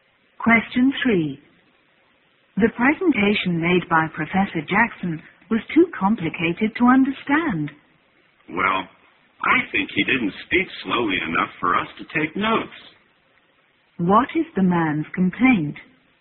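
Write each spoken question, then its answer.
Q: What is the man's complaint?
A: The professor spoke too fast to take notes.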